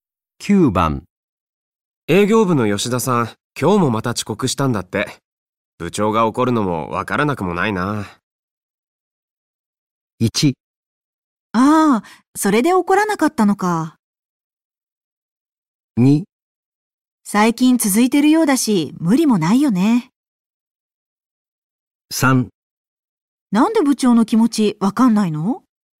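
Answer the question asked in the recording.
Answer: 2: 最近続いてるようだし、無理もないよね。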